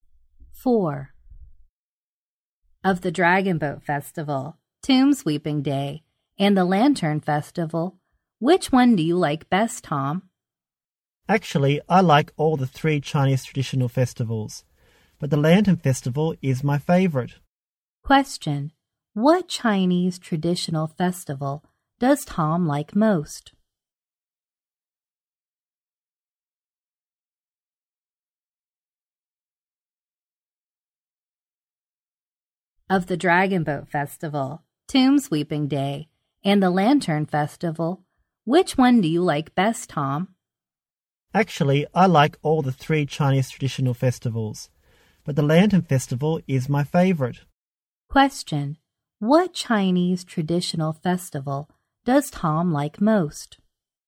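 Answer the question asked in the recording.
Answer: The Lantern Festival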